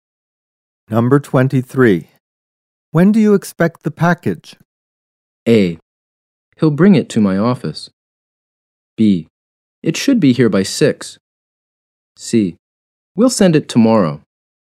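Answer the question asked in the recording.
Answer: B: It should be here by 6.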